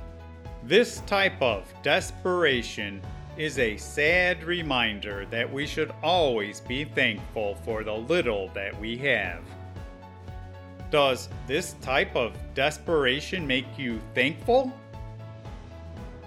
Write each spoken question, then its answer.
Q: Does this type of desperation make you thankful?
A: In a way, it does.